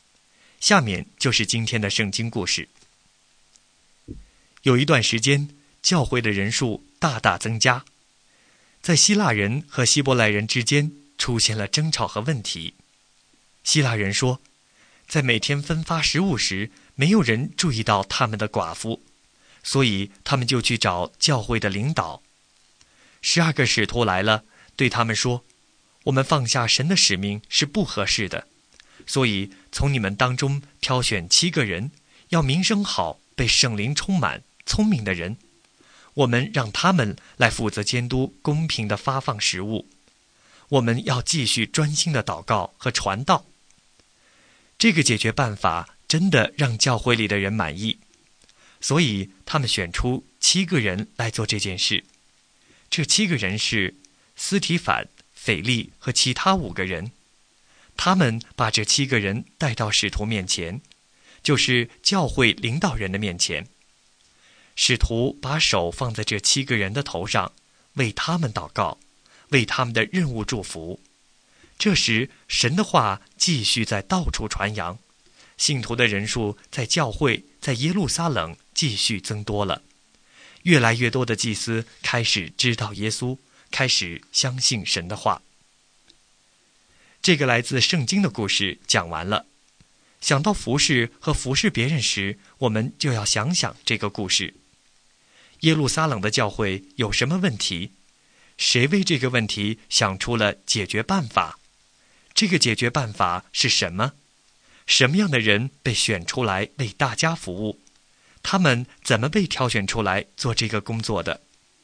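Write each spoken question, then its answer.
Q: 耶路撒冷的教会有什么问题?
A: 希腊人和希伯来人之间出现争吵:每天分发食物时,希腊人的寡妇被忽略了

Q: 谁为这个问题想出了解决办法?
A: 十二个使徒

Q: 这个解决办法是什么?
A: 挑选七个人负责监督公平地发放食物,使徒继续专心祷告和传道

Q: 什么样的人被选出来为大家服务?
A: 名声好、被圣灵充满、聪明的人

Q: 他们怎么被挑选出来做这个工作的?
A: 信徒从自己当中选出七个人,带到使徒面前,使徒按手在他们头上为他们祷告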